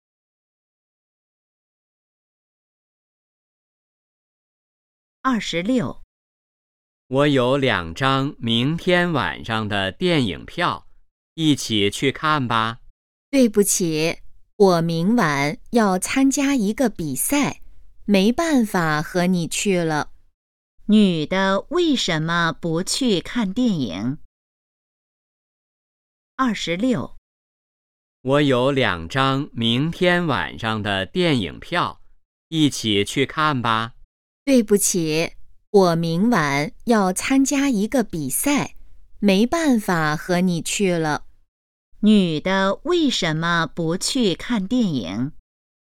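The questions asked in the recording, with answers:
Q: 女的为什么不去看电影?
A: 她明晚要参加一个比赛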